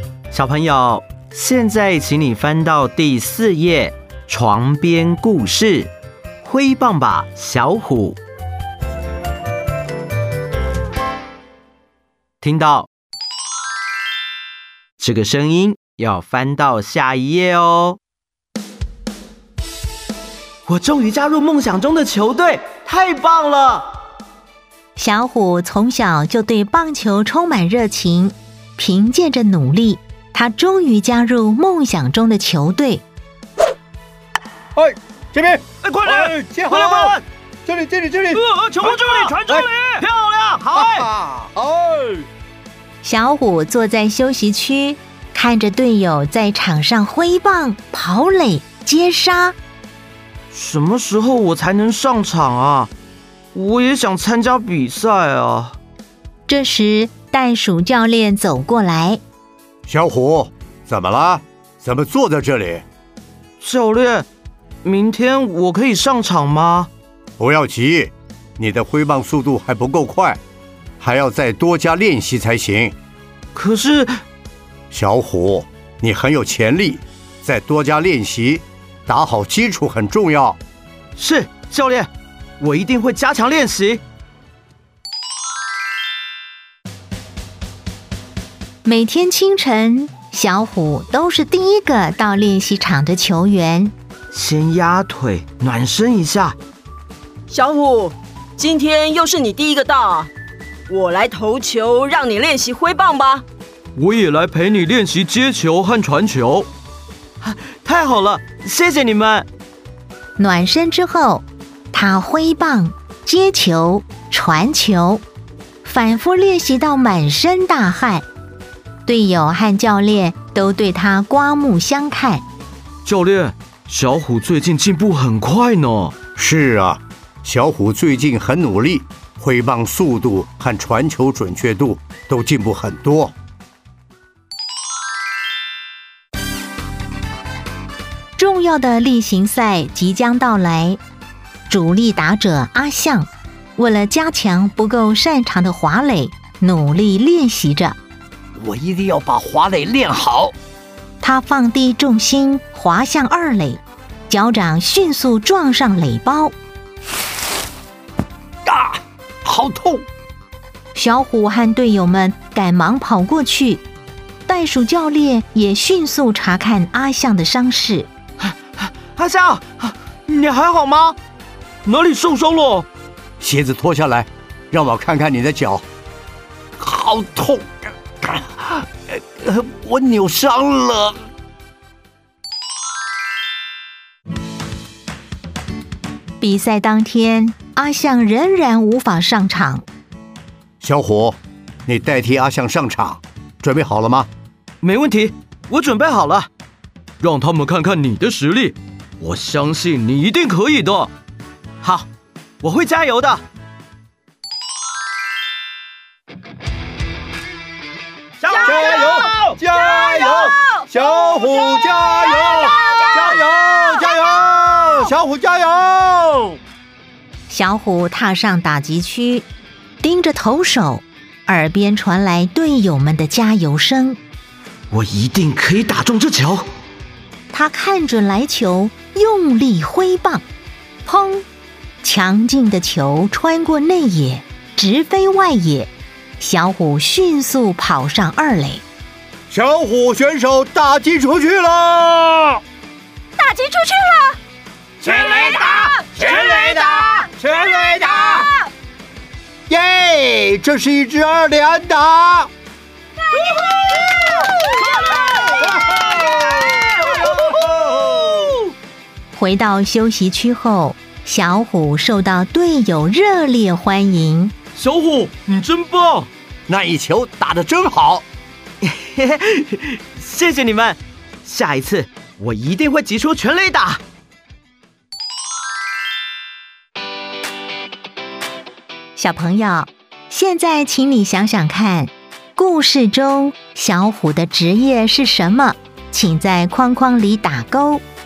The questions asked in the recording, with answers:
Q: 故事中小虎的职业是什么?请在框框里打勾。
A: 棒球员。